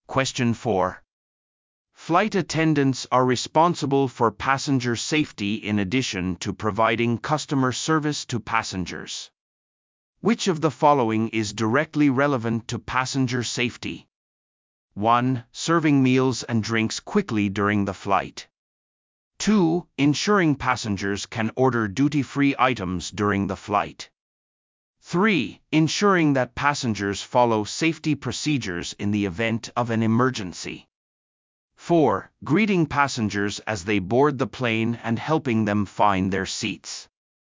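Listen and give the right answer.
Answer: 3: Ensuring that passengers follow safety procedures in the event of an emergency.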